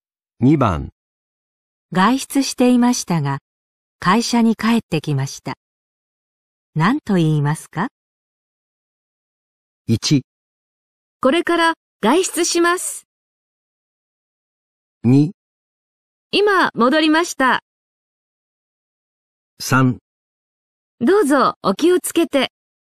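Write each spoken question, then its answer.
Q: 外出していましたが、会社に帰ってきました。何と言いますか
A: 2: 今戻りました。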